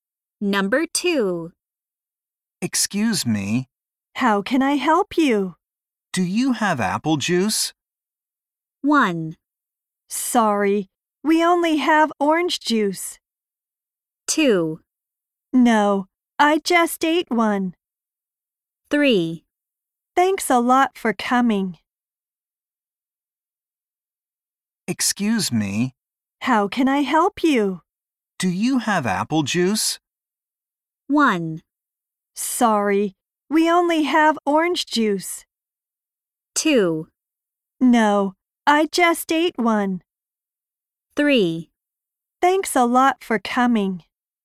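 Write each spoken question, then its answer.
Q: Do you have apple juice?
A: 1: Sorry, we only have orange juice.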